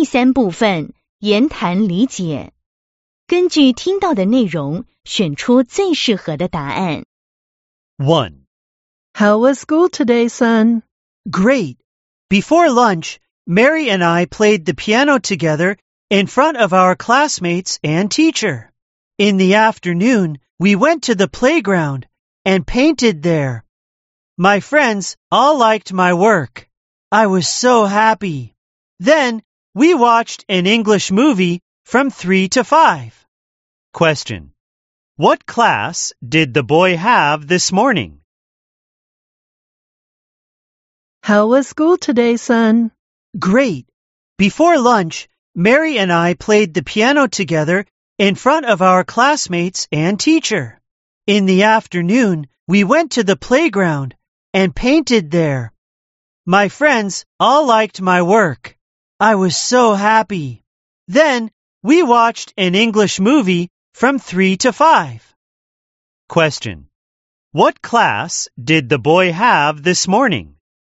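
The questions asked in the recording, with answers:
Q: What class did the boy have this morning?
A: Music (he played the piano)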